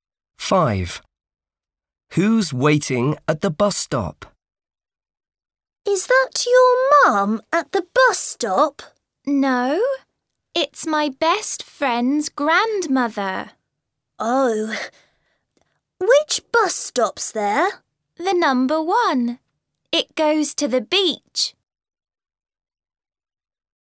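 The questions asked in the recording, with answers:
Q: Who's waiting at the bus stop?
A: his best friend's grandmother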